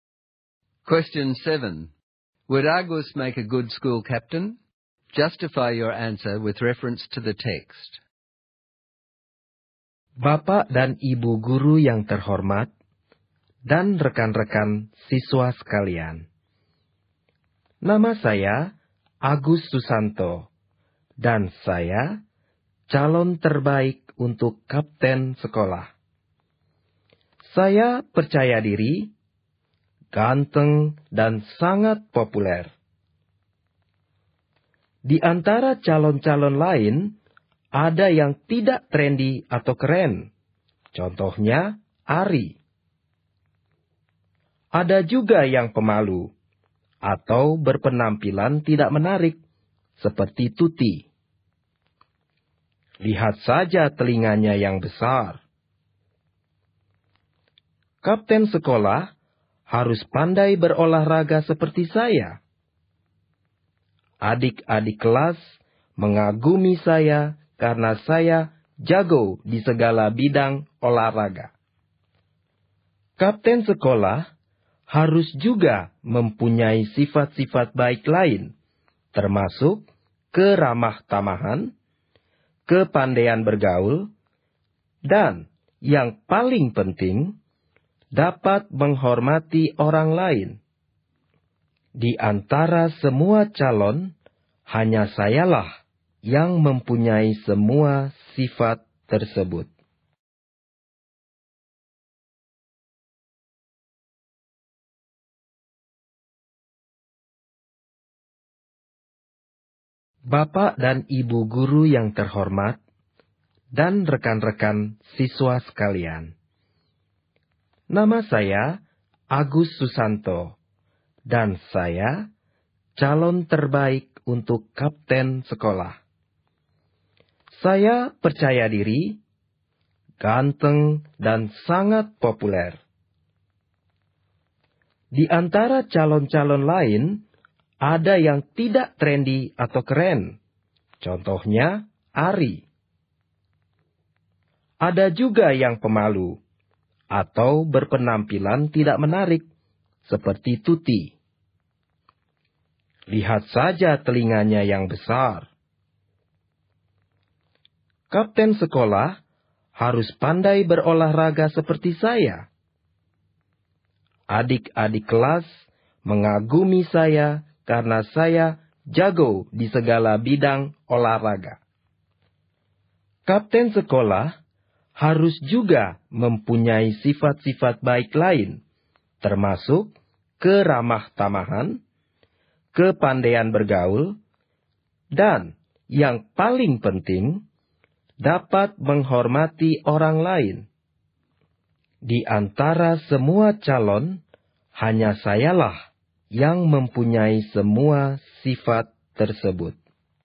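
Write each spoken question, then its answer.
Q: Would Argus make a good school captain?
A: No: he is arrogant and insults other candidates, so he does not respect others as a captain must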